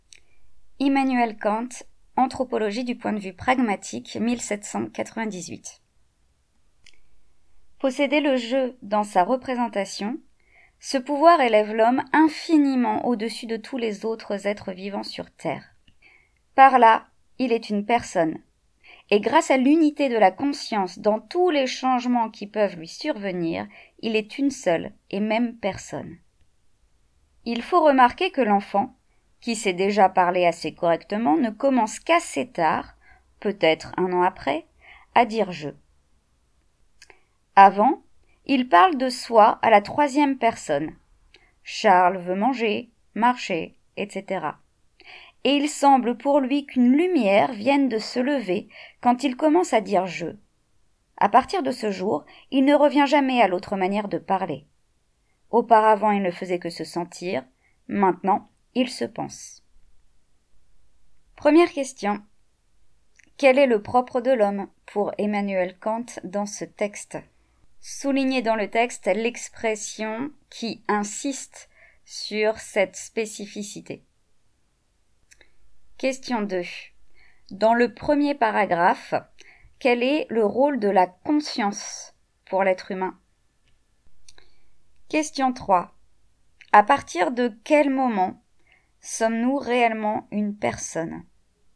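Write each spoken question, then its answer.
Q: Quel est le propre de l'homme pour Emmanuel Kant dans ce texte?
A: Posséder le « je » dans sa représentation, ce qui fait de lui une personne

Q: Dans le premier paragraphe, quel est le rôle de la conscience pour l'être humain?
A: Son unité fait de lui une seule et même personne malgré tous les changements

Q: À partir de quel moment sommes-nous réellement une personne ?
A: Quand on commence à dire « je » et donc à se penser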